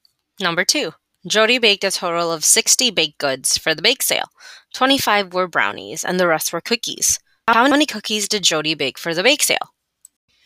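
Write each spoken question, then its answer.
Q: How many cookies did Jody bake for the bake sale?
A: 35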